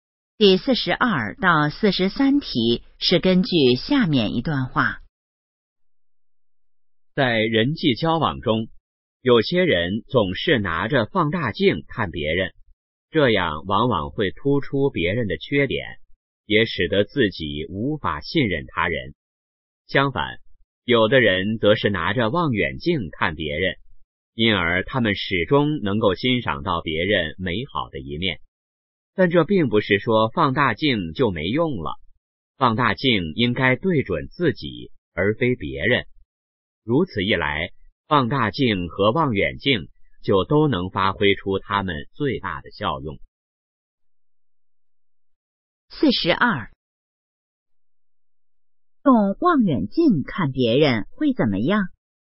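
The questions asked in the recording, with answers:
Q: 用望远镜看别人会怎么样?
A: 能看到别人美好的一面

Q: 根据这段话,我们应该怎么做?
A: 用放大镜看自己,用望远镜看别人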